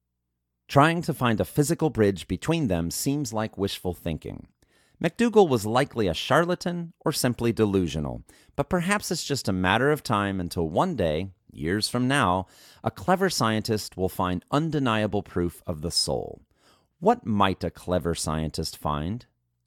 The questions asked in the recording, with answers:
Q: What might a clever scientist find?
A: A clever scientist might find undeniable proof of the soul.